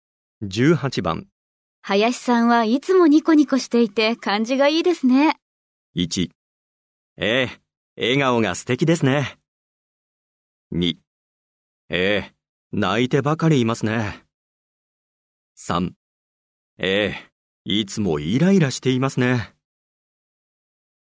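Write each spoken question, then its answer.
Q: 林さんはいつもニコニコしていて感じがいいですね。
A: 1: ええ、笑顔が素敵ですね。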